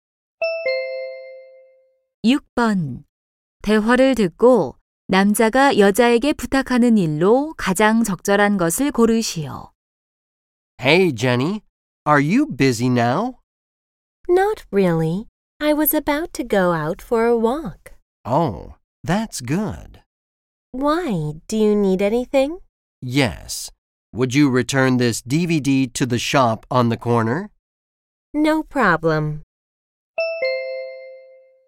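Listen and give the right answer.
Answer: DVD를 가게에 반납하기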